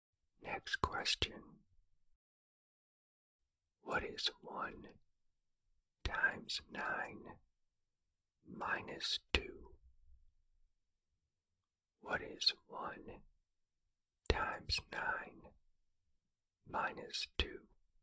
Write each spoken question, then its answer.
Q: What is 1 times 9 minus 2?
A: The answer is 7.